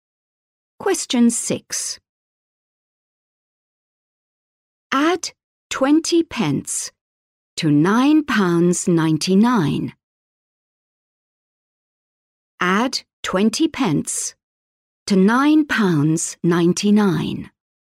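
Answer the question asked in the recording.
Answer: £10.19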